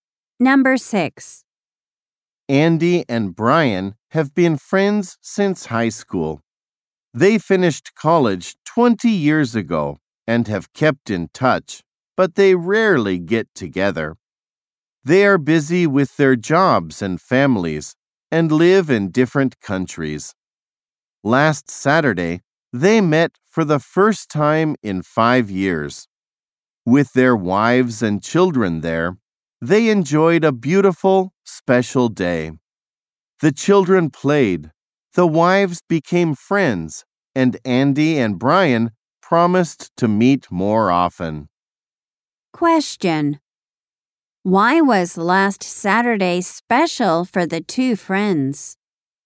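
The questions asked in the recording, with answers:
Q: Why was last Saturday special for the two friends?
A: They met for the first time in 5 years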